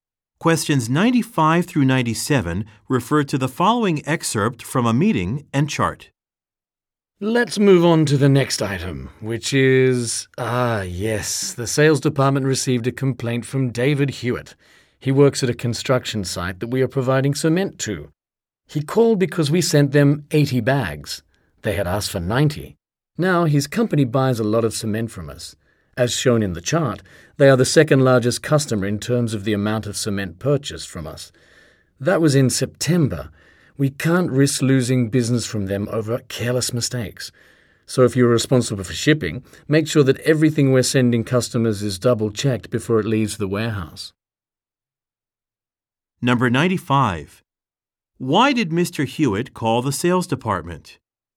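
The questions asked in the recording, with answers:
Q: 95. Why did Mr. Hewitt call the sales department?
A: His site received 80 bags of cement instead of 90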